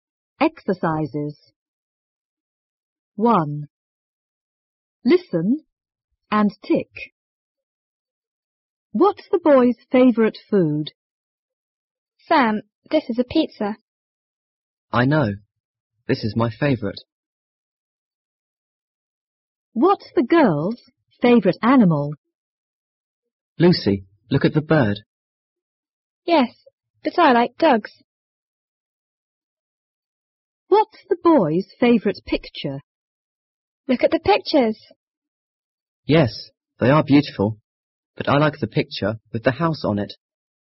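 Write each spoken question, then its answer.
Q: What's the boy's favourite food?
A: Pizza

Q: What's the girl's favourite animal?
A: Dogs

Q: What's the boy's favourite picture?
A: The picture with the house on it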